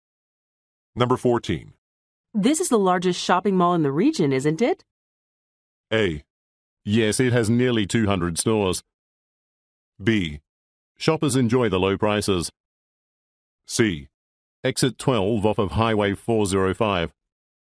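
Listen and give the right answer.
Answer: A: Yes, it has nearly 200 stores.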